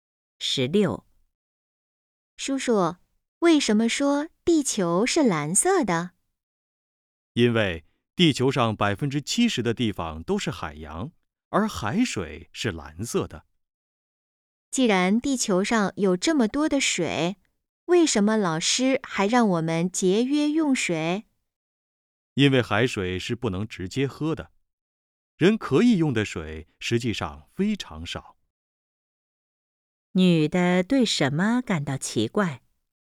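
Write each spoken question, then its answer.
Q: 女的对什么感到奇怪?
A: 地球上水这么多,为什么还要节约用水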